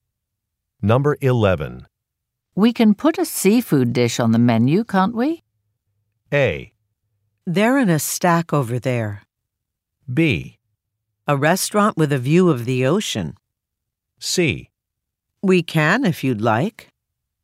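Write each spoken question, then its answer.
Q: We can put a seafood dish on the menu, can't we?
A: C: We can if you'd like.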